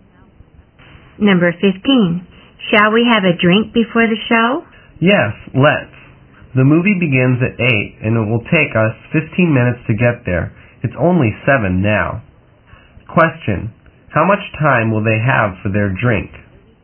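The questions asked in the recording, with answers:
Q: How much time will they have for their drink?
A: 45 minutes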